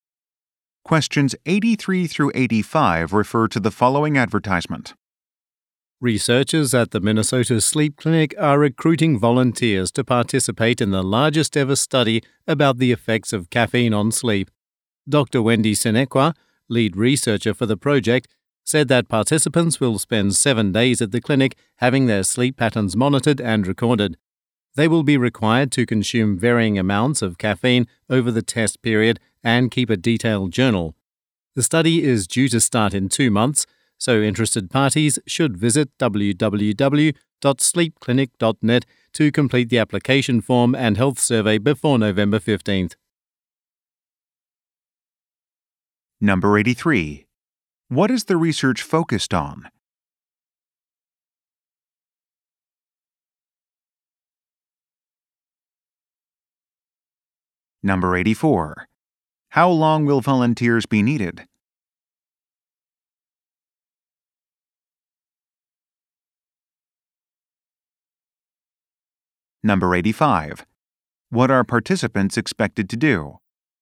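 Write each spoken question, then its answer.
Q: What is the research focused on?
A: The effects of caffeine on sleep

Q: How long will volunteers be needed?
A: 7 days

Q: What are participants expected to do?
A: Consume varying amounts of caffeine and keep a detailed journal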